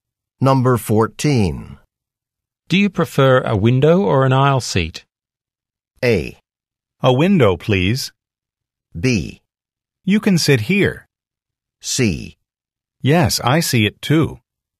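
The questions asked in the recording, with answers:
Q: Do you prefer a window or an aisle seat?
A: A: A window, please.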